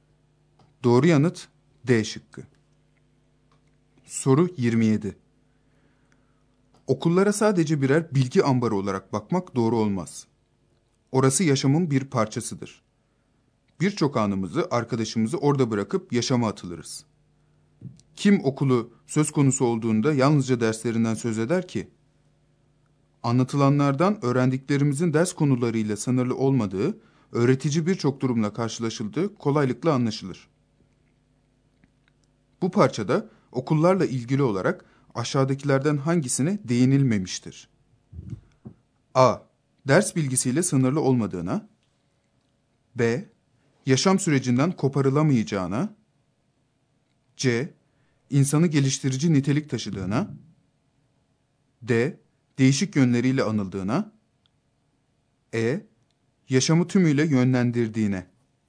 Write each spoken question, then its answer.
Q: Bu parçada okullarla ilgili olarak aşağıdakilerden hangisine değinilmemiştir?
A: Doğru yanıt E şıkkı.